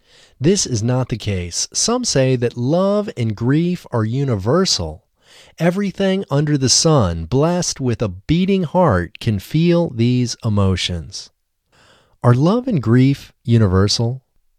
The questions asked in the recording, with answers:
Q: Are love and grief universal?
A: Yes, love and grief are universal.